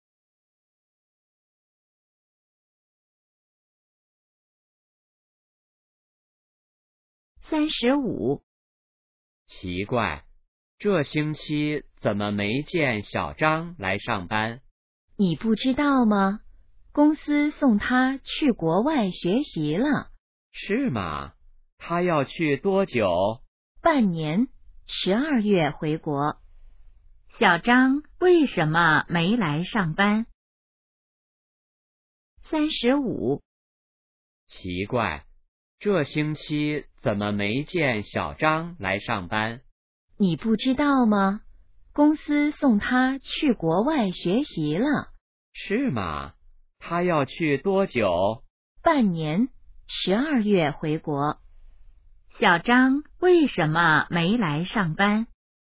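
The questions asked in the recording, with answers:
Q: 小张为什么没来上班?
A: 公司送他去国外学习了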